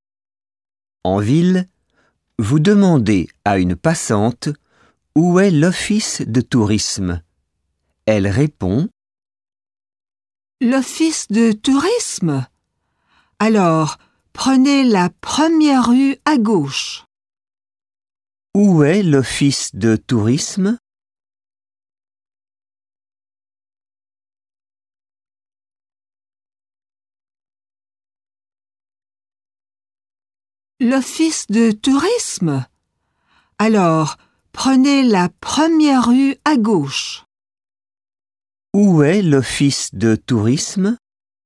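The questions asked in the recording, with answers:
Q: Où est l'office de tourisme?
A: La première rue à gauche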